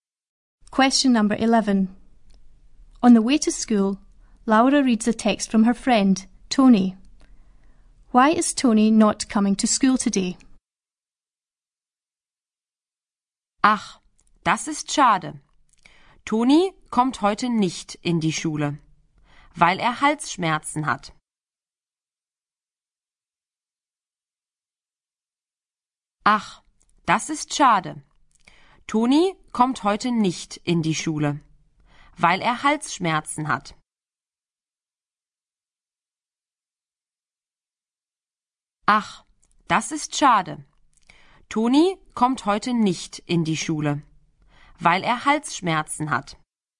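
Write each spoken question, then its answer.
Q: Why is Tony not coming to school today?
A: He has a sore throat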